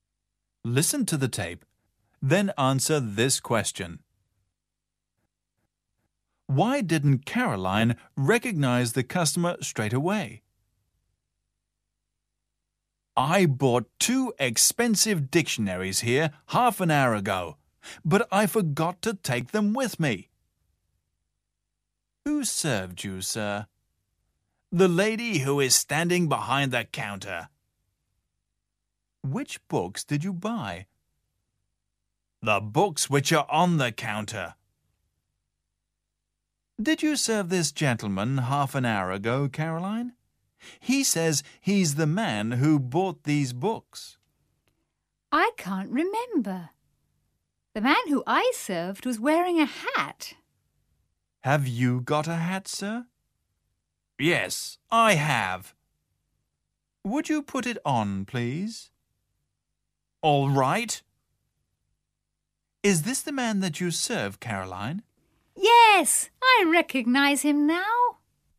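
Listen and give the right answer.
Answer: Because he wasn't wearing his hat; the man she served had been wearing one.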